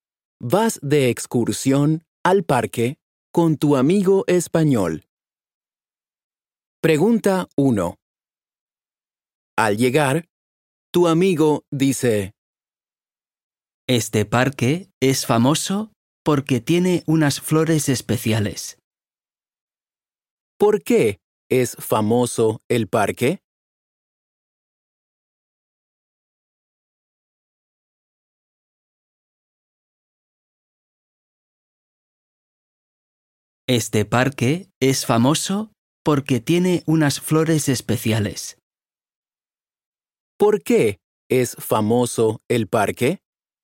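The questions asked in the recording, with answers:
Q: ¿Por qué es famoso el parque?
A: Porque tiene unas flores especiales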